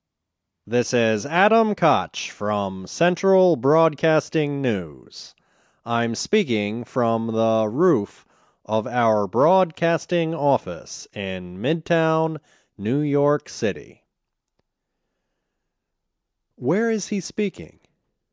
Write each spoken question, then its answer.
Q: Where is he speaking?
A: He is speaking from the roof of the broadcasting office in Midtown, New York City.